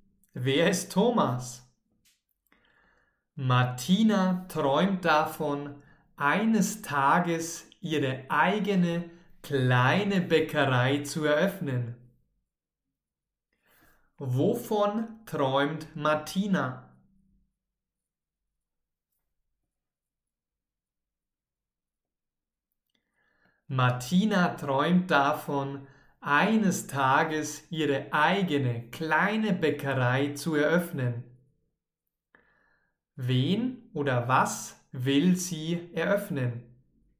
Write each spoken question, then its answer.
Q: Wen oder was will sie eröffnen?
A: Ihre eigene kleine Bäckerei.